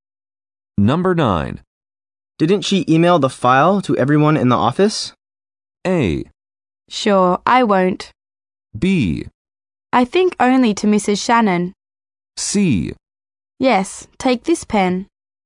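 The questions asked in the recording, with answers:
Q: Didn't she email the file to everyone in the office?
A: B: I think only to Mrs. Shannon.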